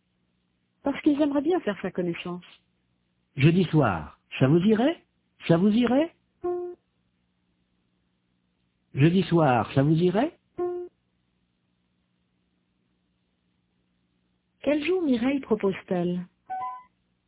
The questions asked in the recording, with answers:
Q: Quel jour Mireille propose-t-elle ?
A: Jeudi.